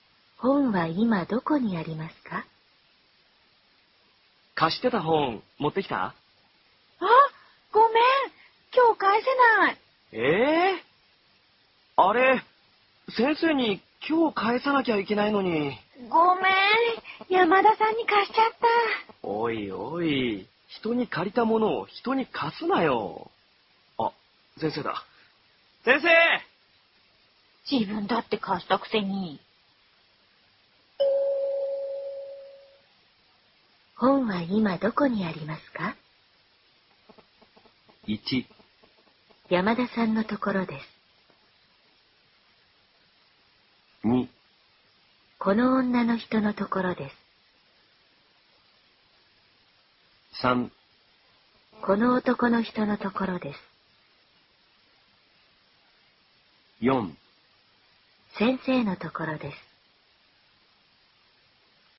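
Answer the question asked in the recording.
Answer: 1: 山田さんのところです。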